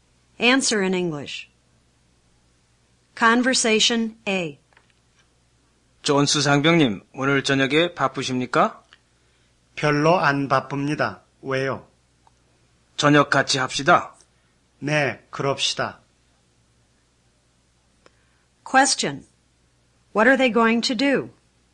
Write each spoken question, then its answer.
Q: What are they going to do?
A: They're going to have dinner together.